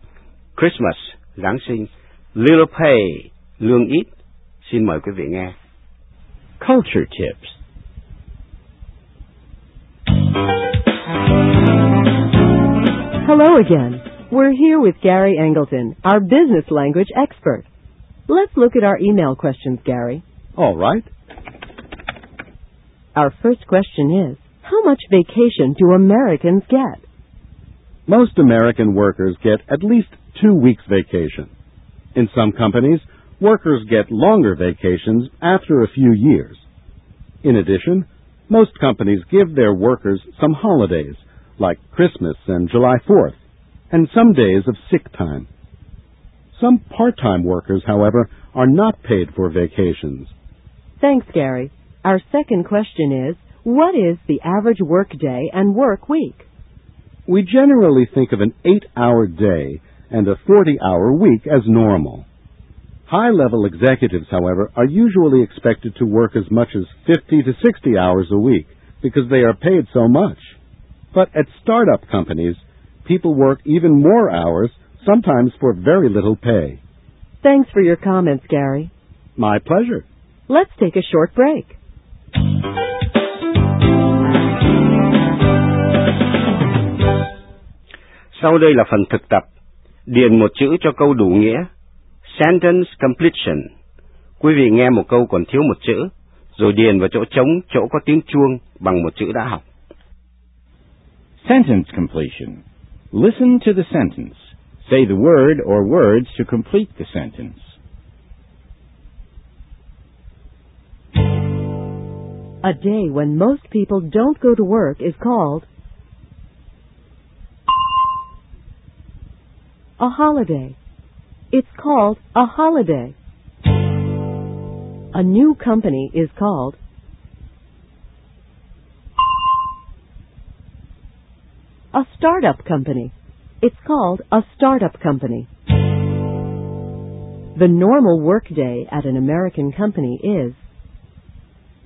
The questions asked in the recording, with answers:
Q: A day when most people don't go to work is called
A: a holiday. It's called a holiday.

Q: The normal work day at an American company is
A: 8 hours. The normal work day is 8 hours.